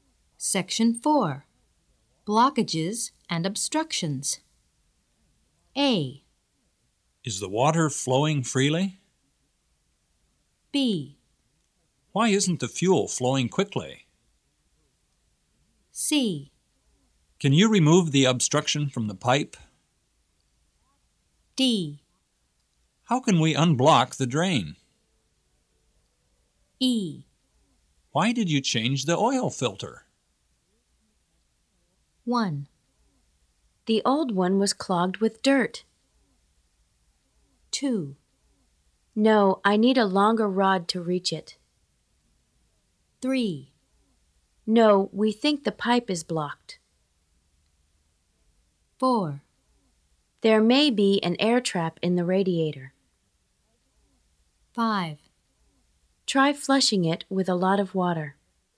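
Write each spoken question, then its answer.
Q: The old one was clogged with dirt.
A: E: Why did you change the oil filter?

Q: No, I need a longer rod to reach it.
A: C: Can you remove the obstruction from the pipe?

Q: No, we think the pipe is blocked.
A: A: Is the water flowing freely?

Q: Try flushing it with a lot of water.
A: D: How can we unblock the drain?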